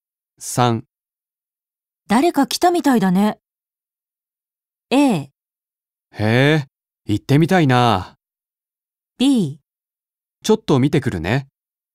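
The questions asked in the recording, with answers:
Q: 誰か来たみたいだね。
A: B: ちょっと見てくるね。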